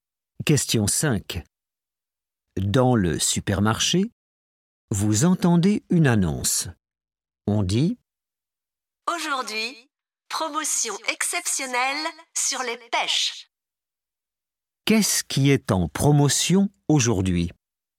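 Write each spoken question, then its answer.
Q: Qu'est-ce qui est en promotion aujourd'hui?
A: les pêches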